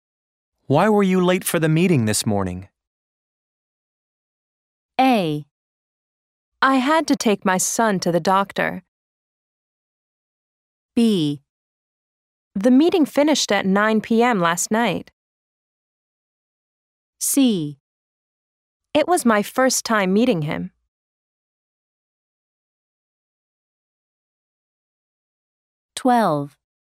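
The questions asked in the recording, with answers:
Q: Why were you late for the meeting this morning?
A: A: I had to take my son to the doctor.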